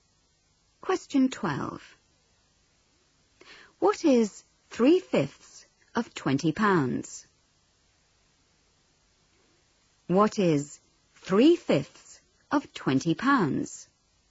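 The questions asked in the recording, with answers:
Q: What is 3/5 of £20?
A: £12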